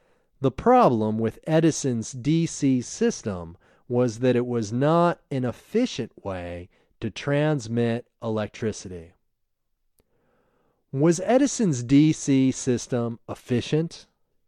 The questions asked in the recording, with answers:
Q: Was Edison's DC system efficient?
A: No, Edison's DC system wasn't efficient.